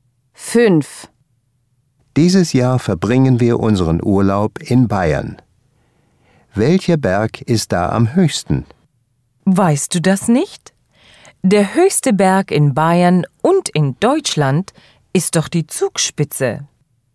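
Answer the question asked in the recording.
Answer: Die Zugspitze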